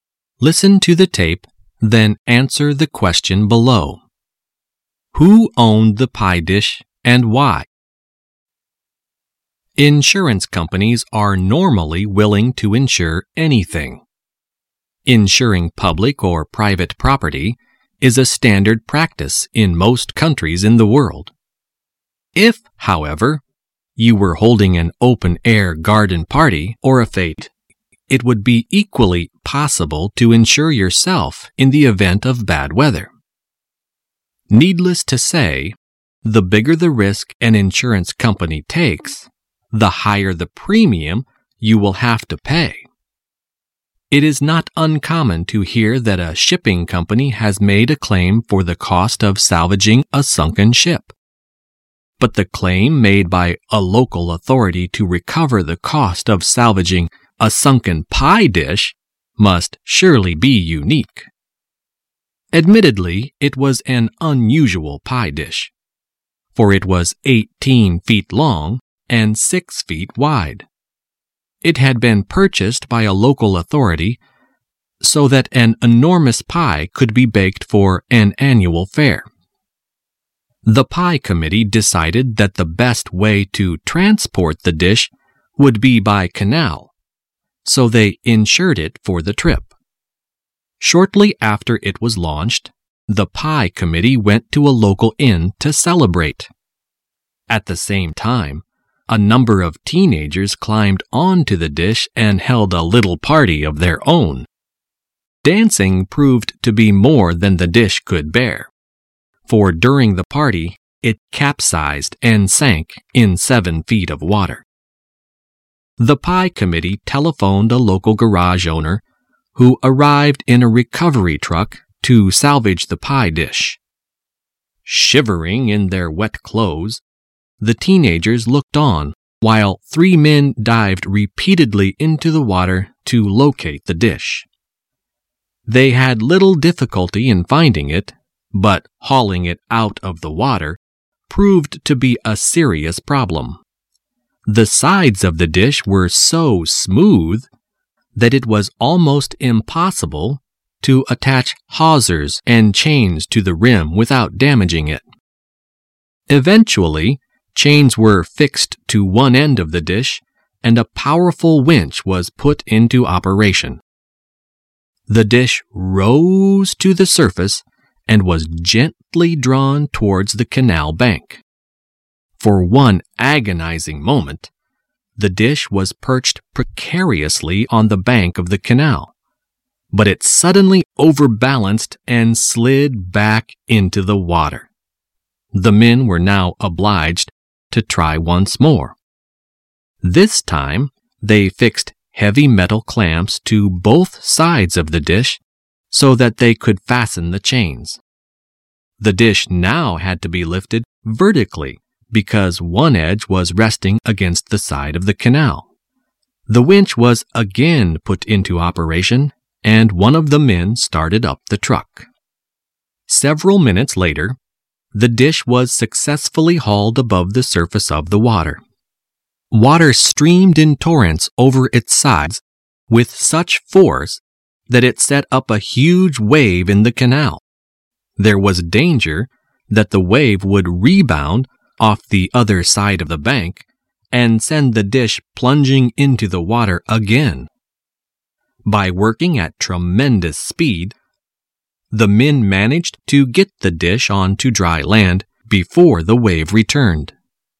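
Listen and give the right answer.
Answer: A local authority owned it; it bought the dish so an enormous pie could be baked for an annual fair.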